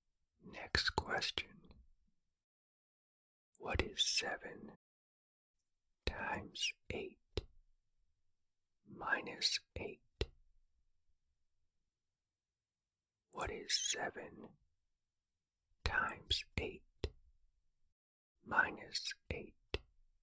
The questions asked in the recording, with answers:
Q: What is 7 times 8 minus 8?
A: The answer is 48.